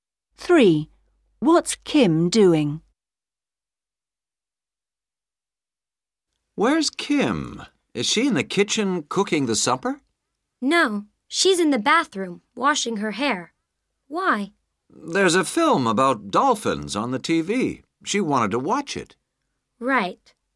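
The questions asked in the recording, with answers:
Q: What's Kim doing?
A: washing her hair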